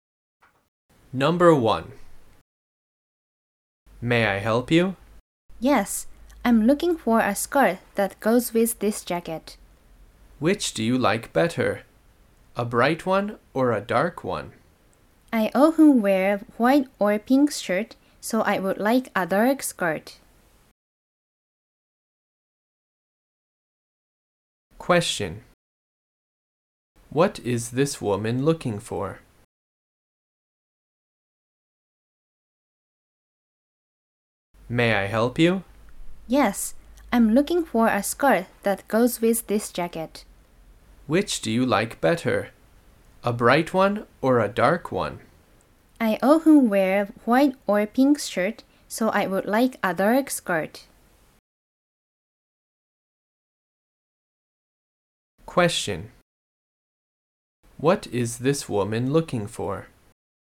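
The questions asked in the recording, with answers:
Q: What is this woman looking for?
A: A dark skirt that goes with her jacket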